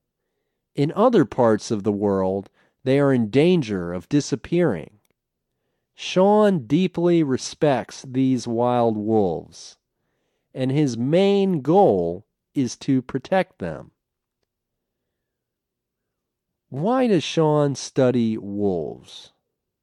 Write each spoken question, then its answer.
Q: Why does Sean study wolves?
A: His main goal is to protect them.